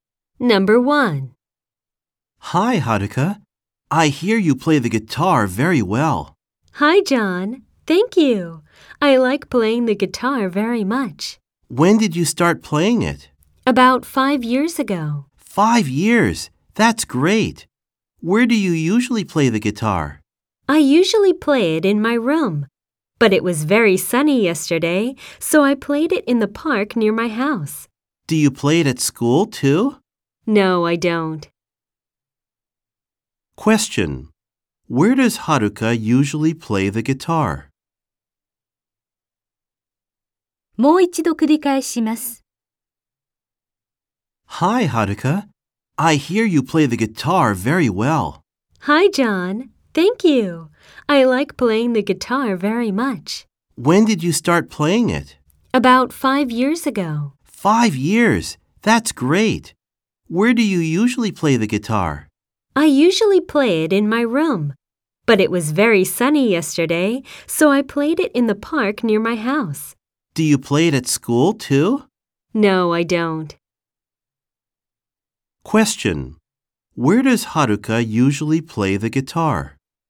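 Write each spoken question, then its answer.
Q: Where does Haruka usually play the guitar?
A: In her room.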